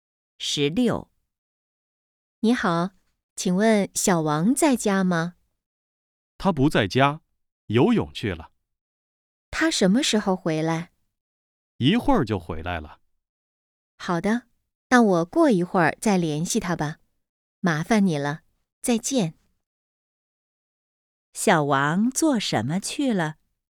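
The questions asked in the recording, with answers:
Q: 小王做什么去了?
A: 游泳去了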